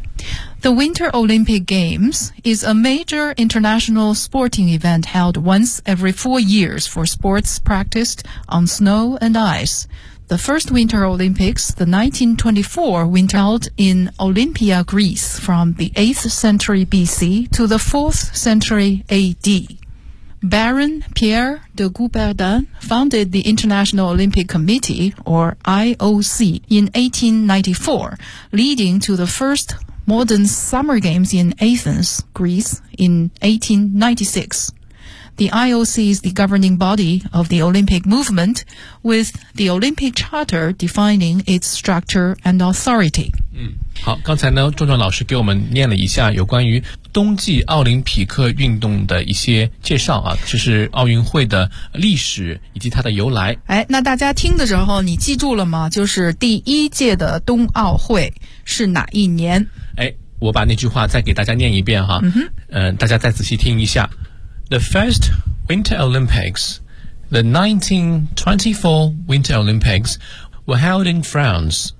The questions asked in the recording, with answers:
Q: 就是第一届的冬奥会是哪一年?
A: 是1924年哈